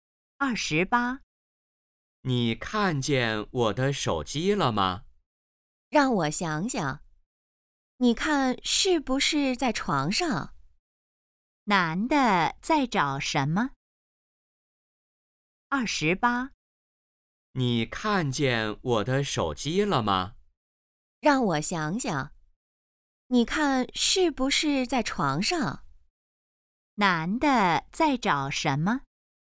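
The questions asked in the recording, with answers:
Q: 男的在找什么?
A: 手机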